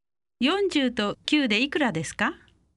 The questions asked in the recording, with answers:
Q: 40と9でいくらですか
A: 49 49